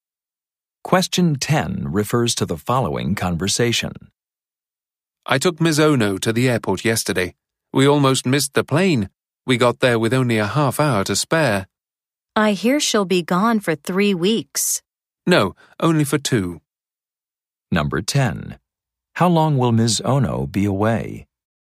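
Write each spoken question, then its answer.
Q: How long will Ms.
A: 2 weeks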